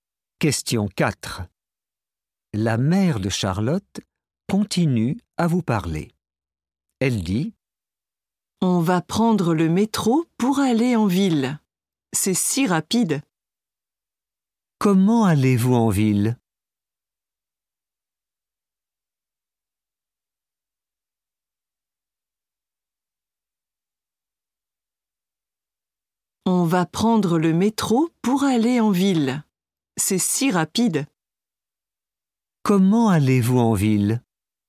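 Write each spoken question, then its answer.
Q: Comment allez-vous en ville?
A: En métro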